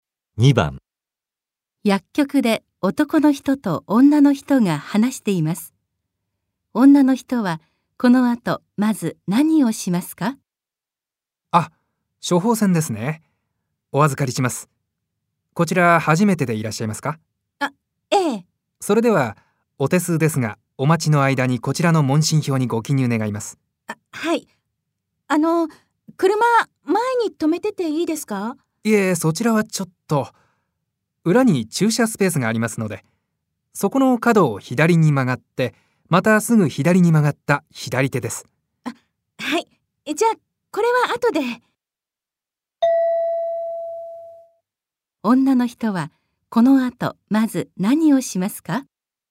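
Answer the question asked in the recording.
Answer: 車を裏の駐車スペースに移動する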